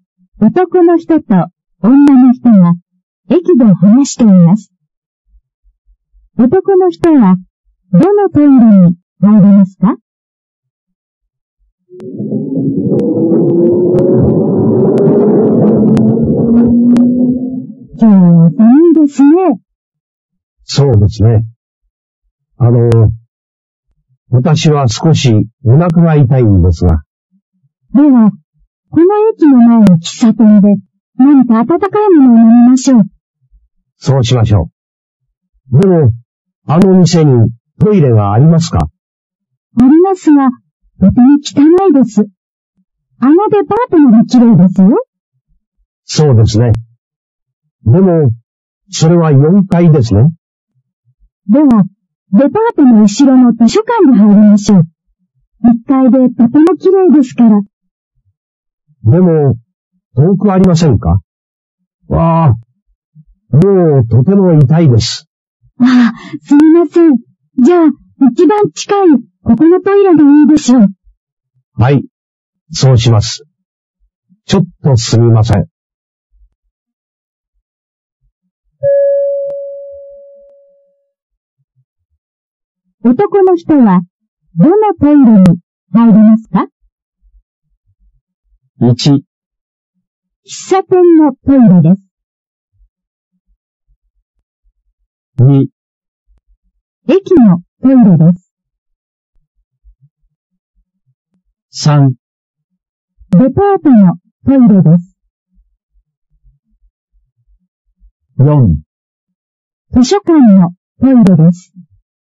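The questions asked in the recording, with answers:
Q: 男の人は、どのトイレに入りますか?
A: 2: 駅のトイレです。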